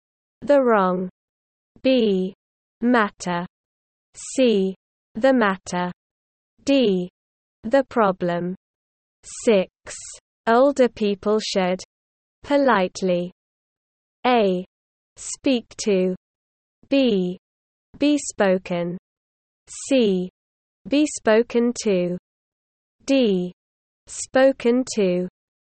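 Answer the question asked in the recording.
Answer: C: Be spoken to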